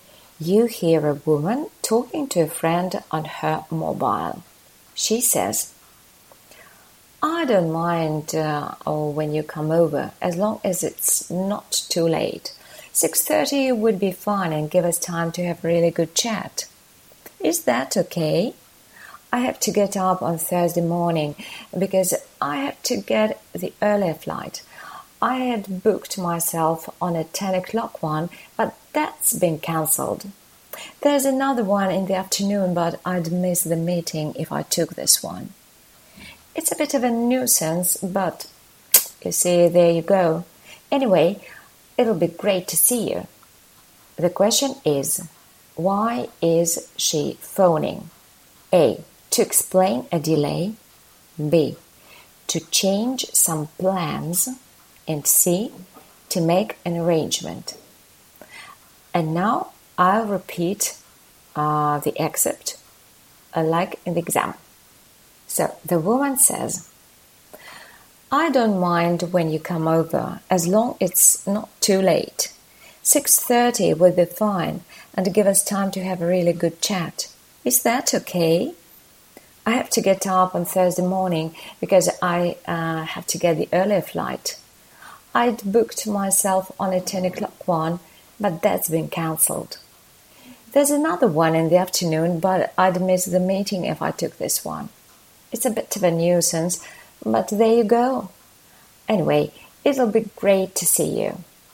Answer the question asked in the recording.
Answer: So option C is the correct one.